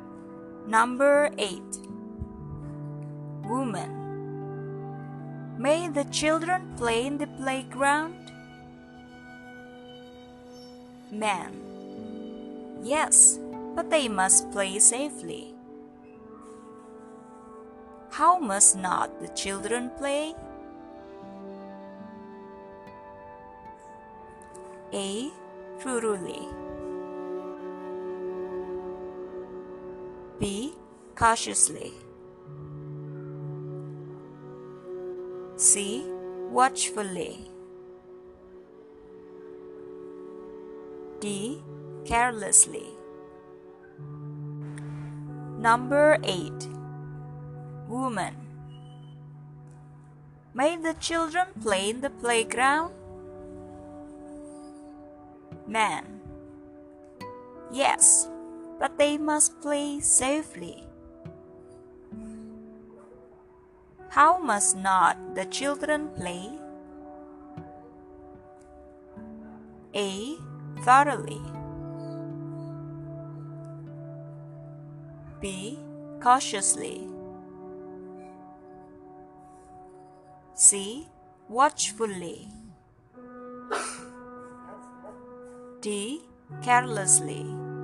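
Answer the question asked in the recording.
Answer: D: Carelessly.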